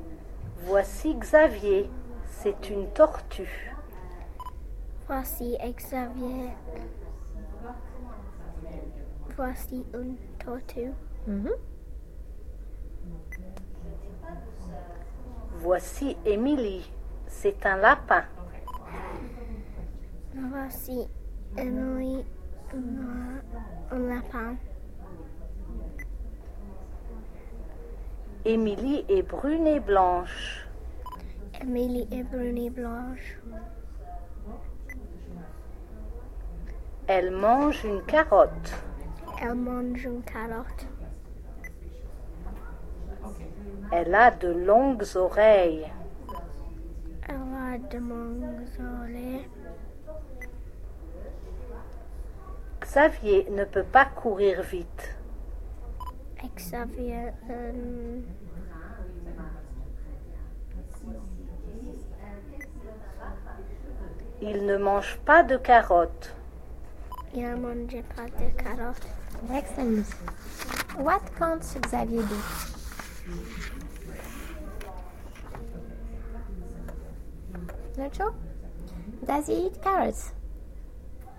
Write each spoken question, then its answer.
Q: Does he eat carrots?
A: No.